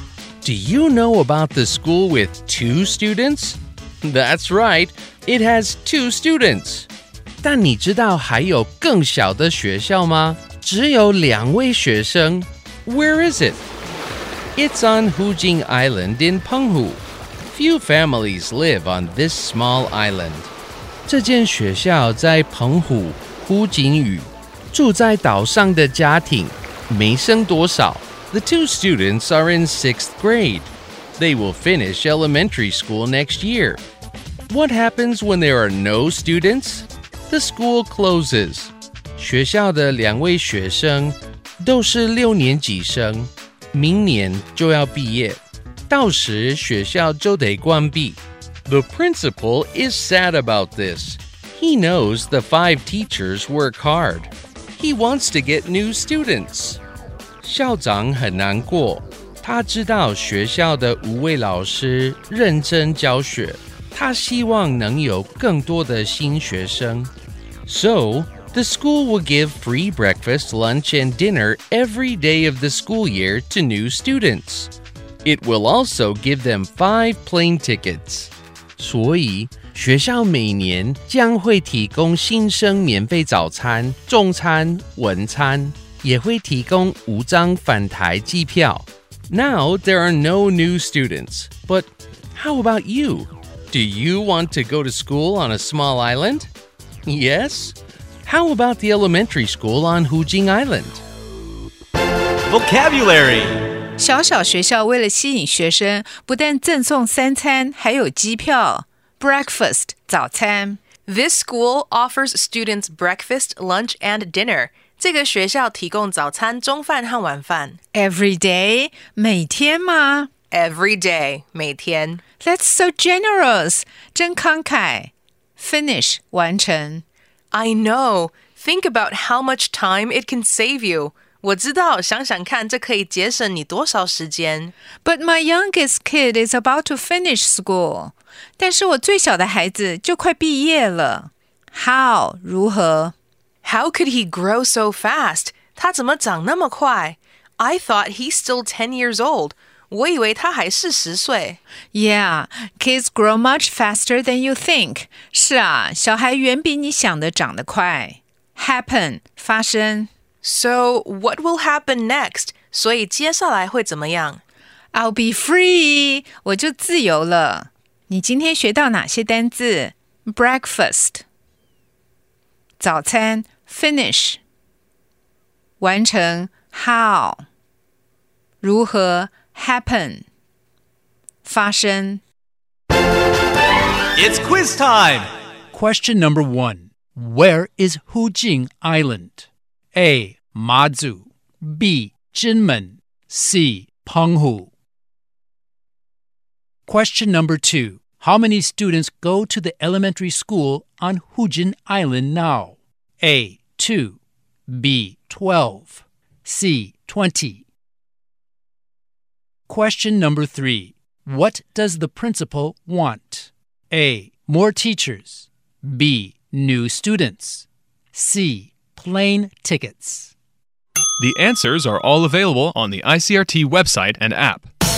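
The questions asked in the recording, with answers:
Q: Where is Hujing Island? A. Mazu. B. Jinmen. C. Penghu.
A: C: Penghu

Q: How many students go to the elementary school on Hujin Island now?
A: A: 2

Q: What does the principal want?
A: B: New students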